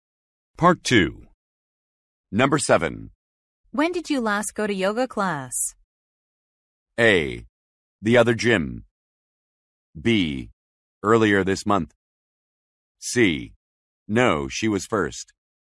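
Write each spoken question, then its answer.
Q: When did you last go to yoga class?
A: B: Earlier this month.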